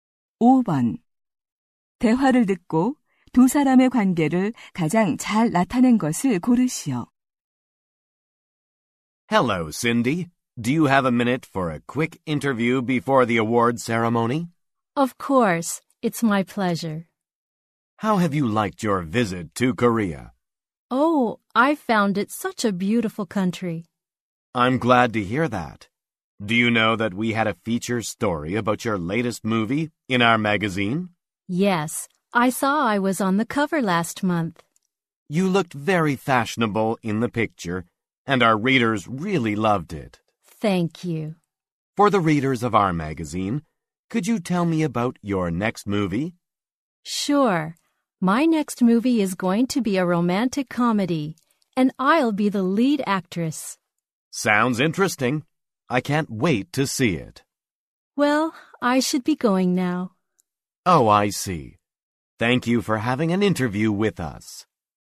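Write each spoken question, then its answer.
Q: 대화를 듣고 두 사람의 관계를 가장 잘 나타낸 것을 고르시오.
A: 잡지 기자 - 영화배우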